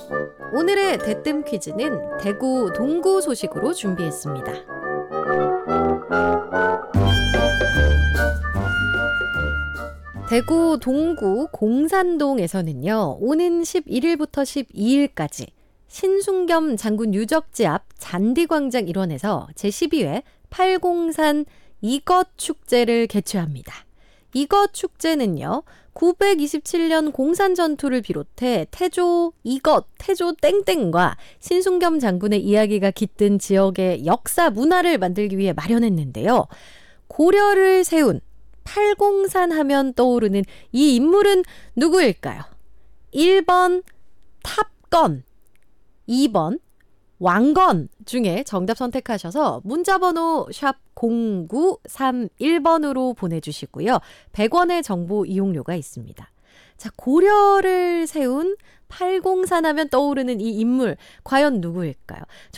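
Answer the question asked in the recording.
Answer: 2번: 왕건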